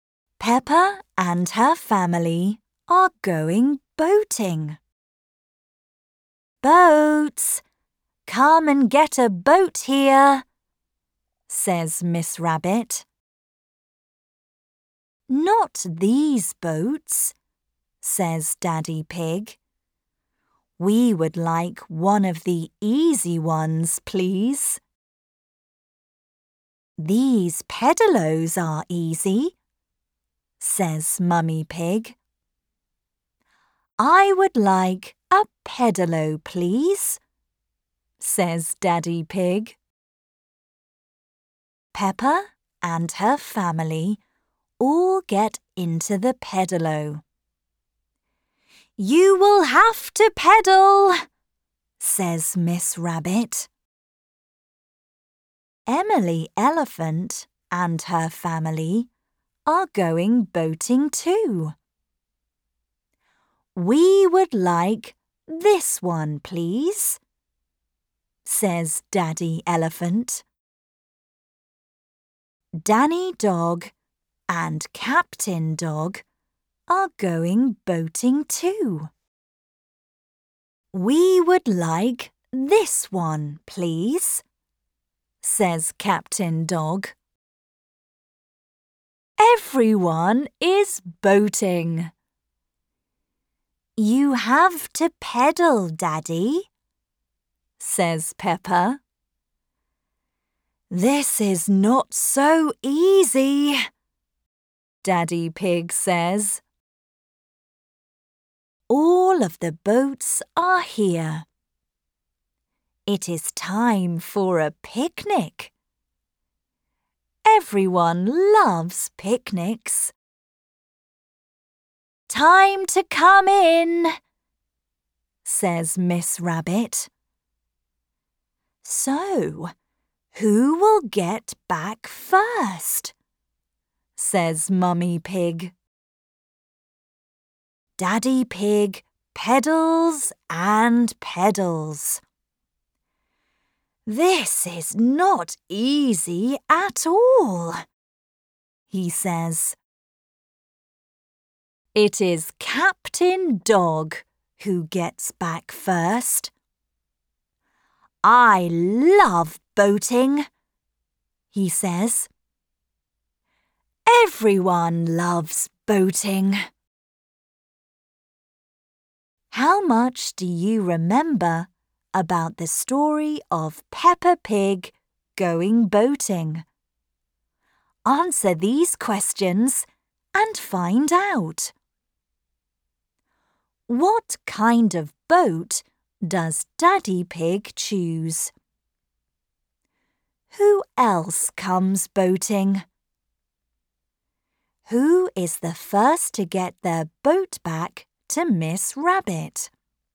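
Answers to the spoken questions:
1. A pedalo
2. Emily Elephant and her family, and Danny Dog and Captain Dog
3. Captain Dog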